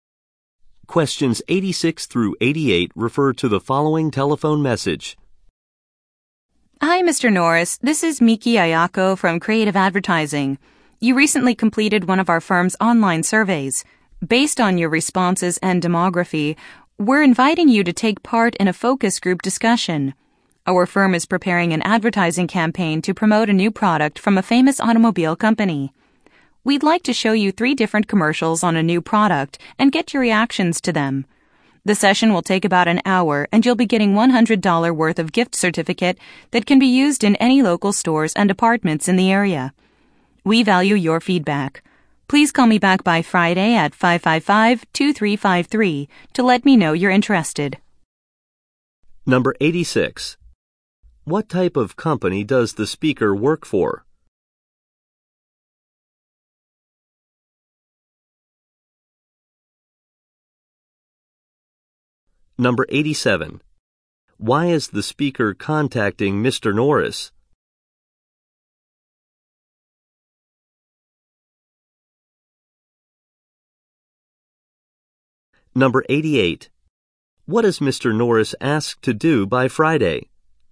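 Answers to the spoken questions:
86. An advertising firm
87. To invite him to a focus group discussion
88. Call the speaker back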